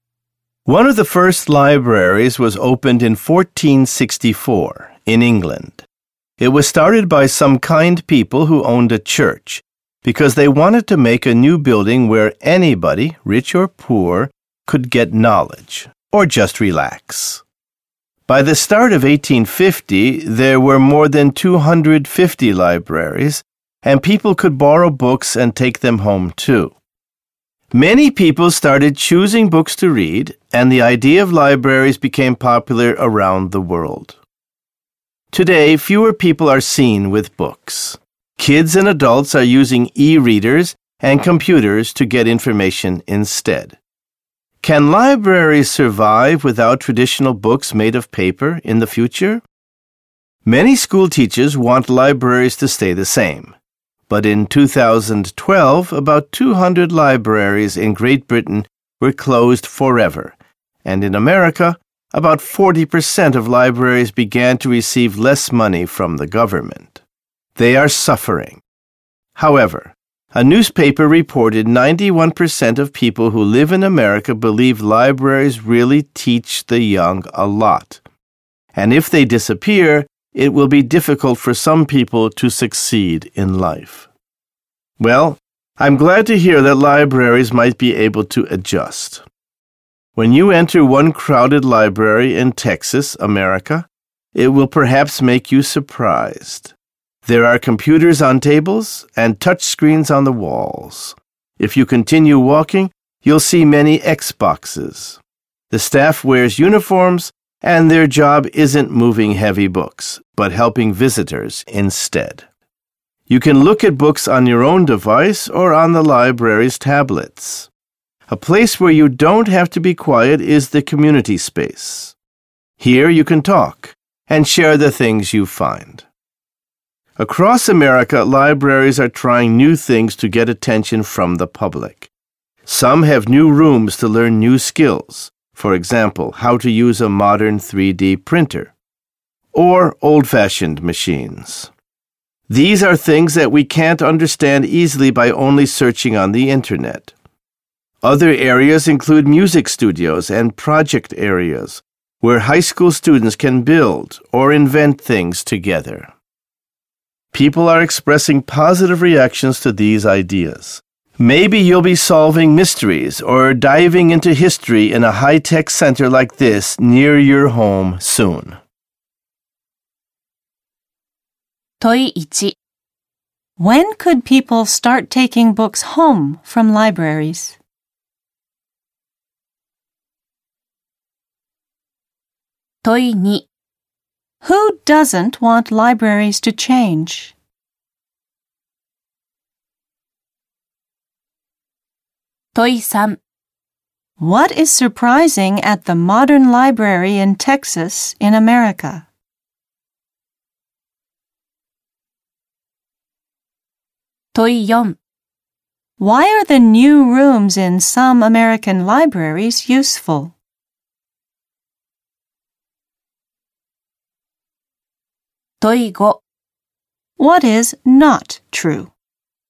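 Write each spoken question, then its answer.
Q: When could people start taking books home from libraries?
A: By the start of 1850

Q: Who doesn't want libraries to change?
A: Many school teachers

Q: What is surprising at the modern library in Texas in America?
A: Computers, touch screens on the walls and many Xboxes

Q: Why are the new rooms in some American libraries useful?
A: You can learn skills there that are hard to understand just by searching the internet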